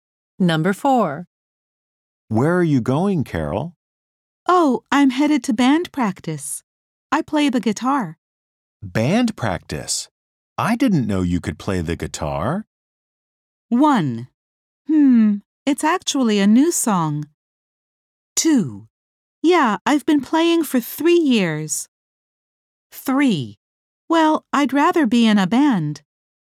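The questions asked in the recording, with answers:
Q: Band practice? I didn't know you could play the guitar.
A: 2: Yeah, I've been playing for 3 years.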